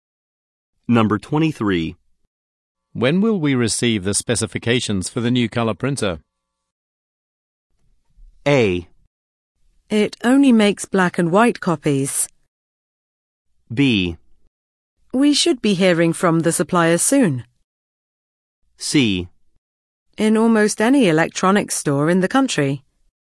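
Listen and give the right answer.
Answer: B: We should be hearing from the supplier soon.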